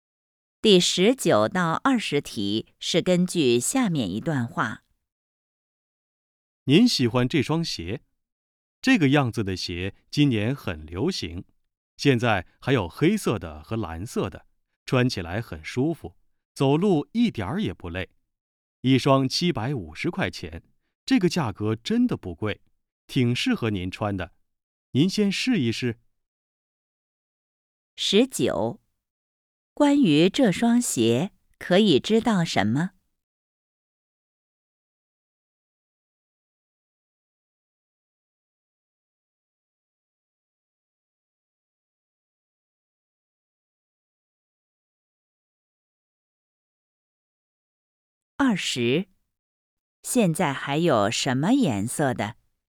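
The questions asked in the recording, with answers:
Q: 现在还有什么颜色的?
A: 黑色的和蓝色的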